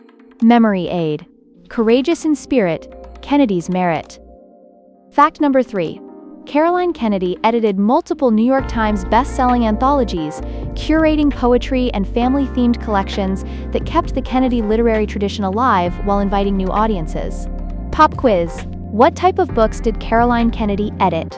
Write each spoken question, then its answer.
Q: What type of books did Caroline Kennedy edit?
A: anthologies.